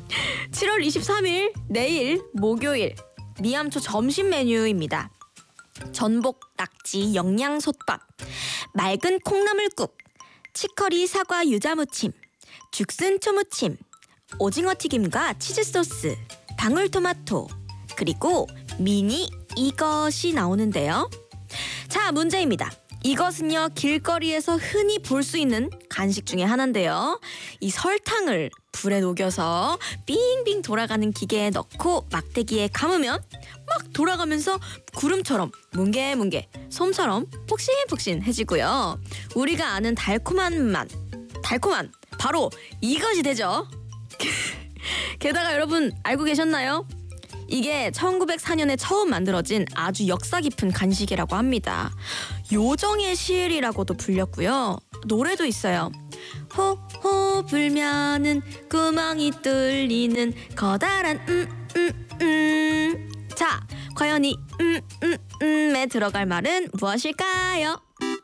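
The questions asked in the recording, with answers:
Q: 과연 이 에 들어갈 말은 무엇일까요?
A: 솜사탕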